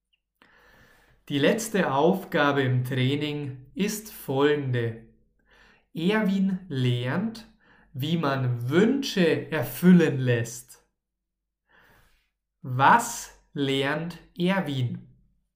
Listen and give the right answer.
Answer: Wie man Wünsche erfüllen lässt.